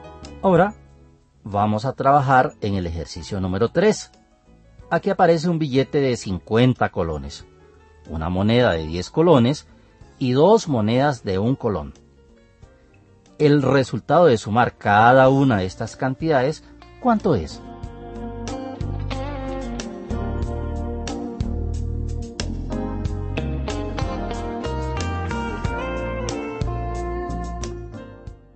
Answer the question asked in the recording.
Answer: ¡62!